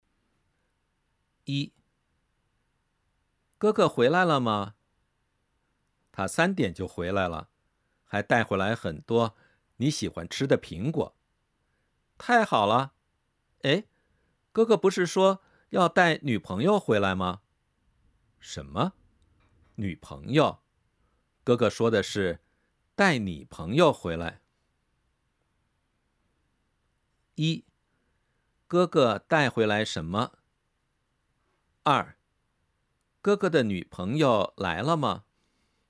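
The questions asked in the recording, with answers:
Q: 哥哥带回来什么?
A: 很多苹果

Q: 哥哥的女朋友来了吗?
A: 没有,哥哥带回来的是你的朋友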